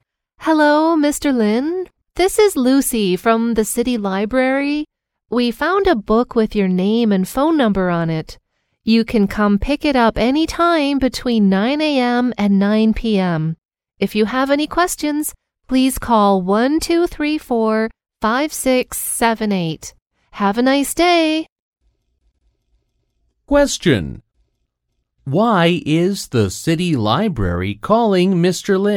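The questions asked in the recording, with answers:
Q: Why is the city library calling Mr.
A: They found a book with his name and phone number on it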